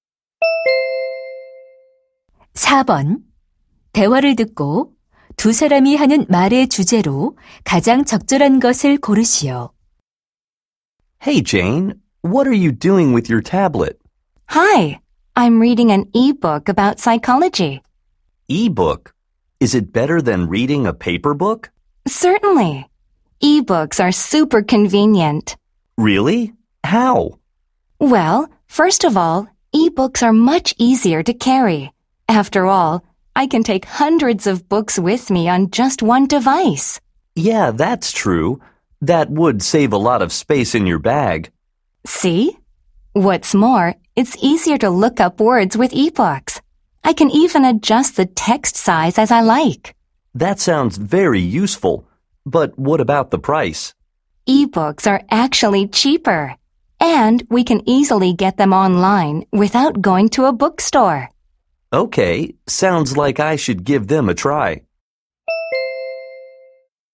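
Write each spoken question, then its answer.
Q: 대화를 듣고 두 사람이 하는 말의 주제로 가장 적절한 것을 고르시오.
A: 전자책의 장점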